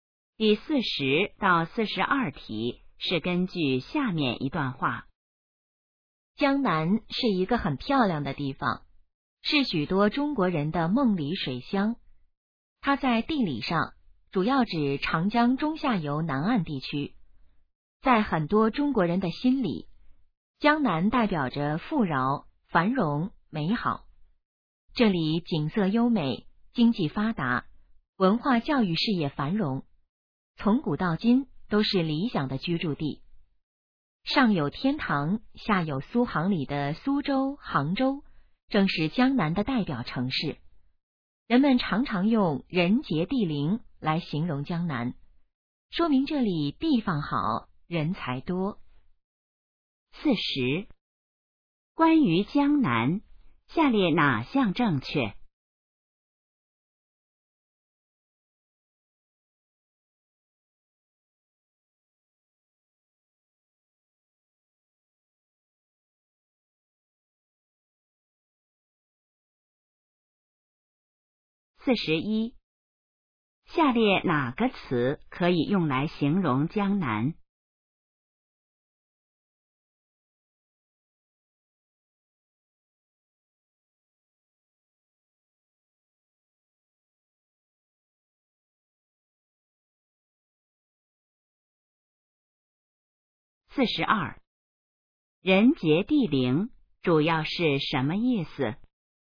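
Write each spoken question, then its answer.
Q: 人杰地灵主要是什么意思?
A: 地方好,人才多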